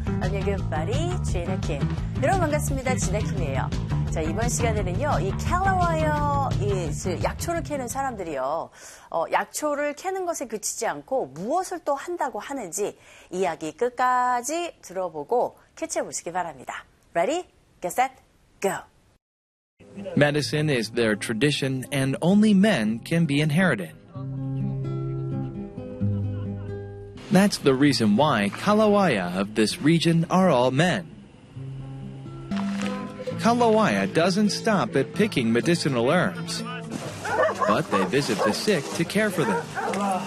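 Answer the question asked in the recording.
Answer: 아픈 사람들을 찾아가 돌본다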